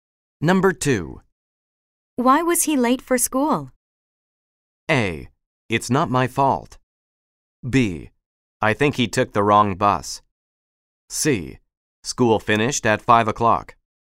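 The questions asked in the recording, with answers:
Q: Why was he late for school?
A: B: I think he took the wrong bus.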